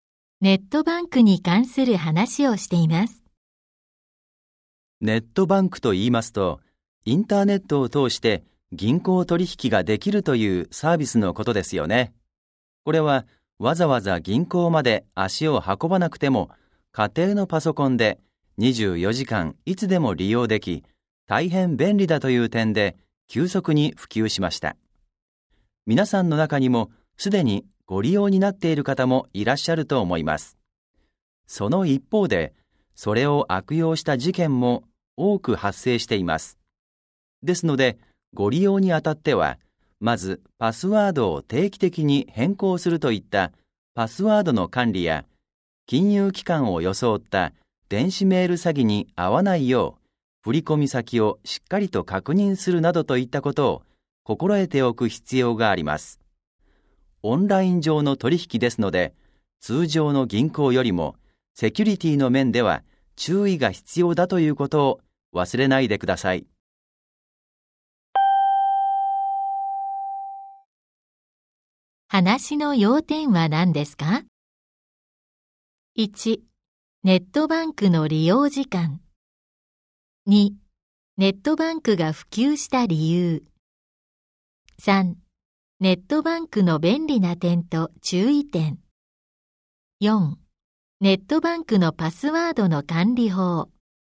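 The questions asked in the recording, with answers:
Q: 話の要点は何ですか ?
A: 3: ネットバンクの便利な点と注意点。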